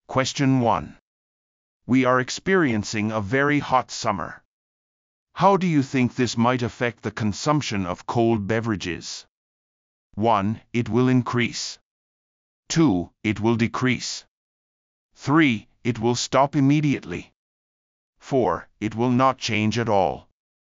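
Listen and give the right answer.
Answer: 1: It will increase.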